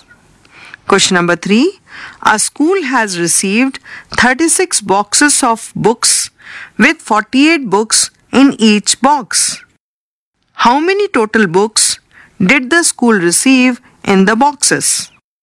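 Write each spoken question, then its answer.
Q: How many total books did the school receive in the boxes?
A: 1728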